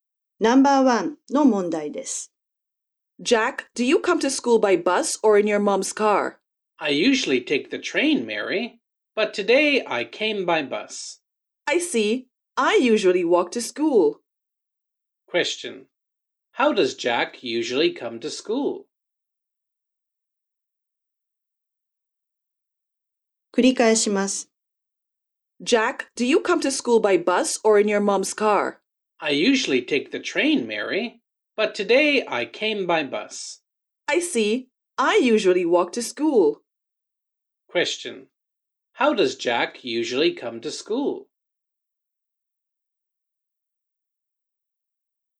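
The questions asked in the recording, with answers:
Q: How does Jack usually come to school?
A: By train.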